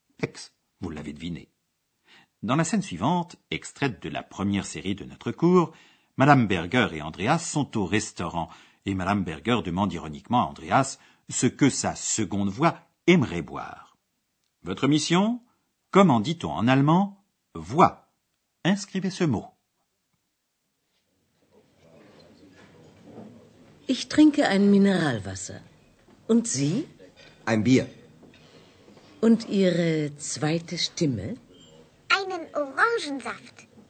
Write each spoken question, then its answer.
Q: Votre mission Comment dit-on en allemand Voix.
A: Ce mot est Stimme